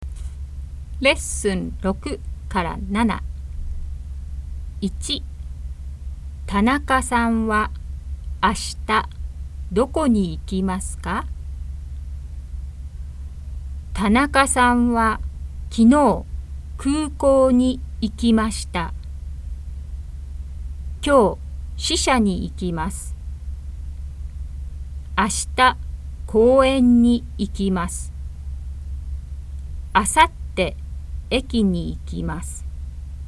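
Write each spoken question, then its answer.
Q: 中さんは明日どこに行きますか?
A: 公園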